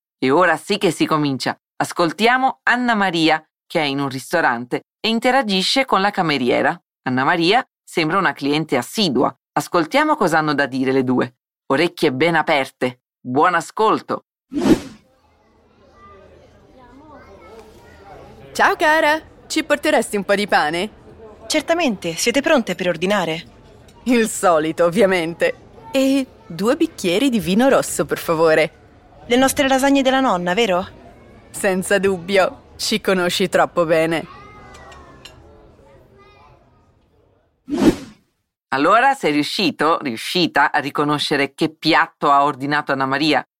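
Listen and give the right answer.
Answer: Le lasagne della nonna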